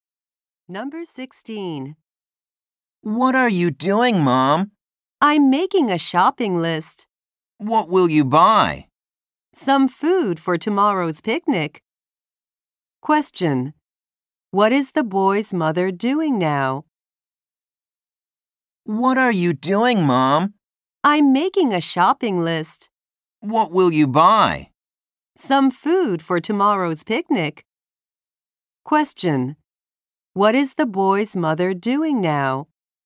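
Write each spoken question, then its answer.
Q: What is the boy's mother doing now?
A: Making a shopping list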